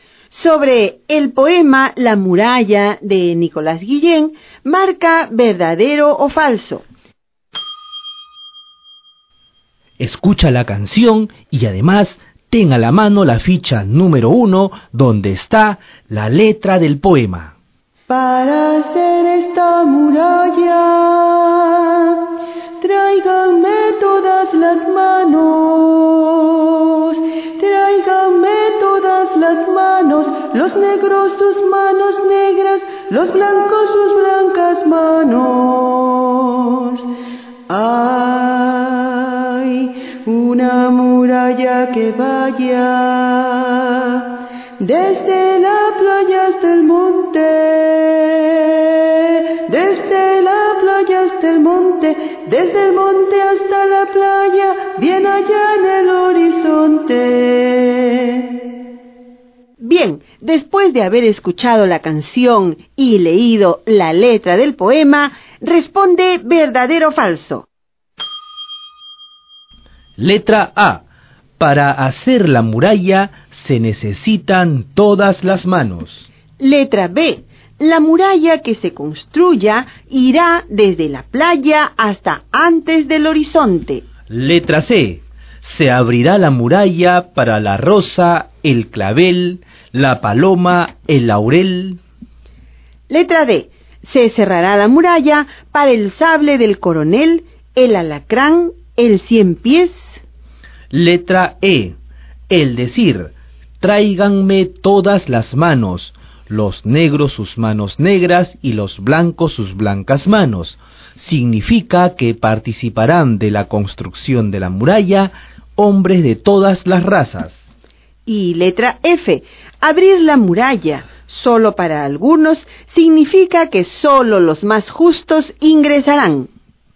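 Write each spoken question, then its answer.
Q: Letra A. Para hacer la muralla se necesitan todas las manos.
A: Verdadero

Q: Letra B. La muralla que se construya irá desde la playa hasta antes del horizonte.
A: Falso

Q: Letra E. El decir, tráiganme todas las manos, los negros sus manos negras y los blancos sus blancas manos, significa que participarán de la construcción de la muralla hombres de todas las razas.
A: Verdadero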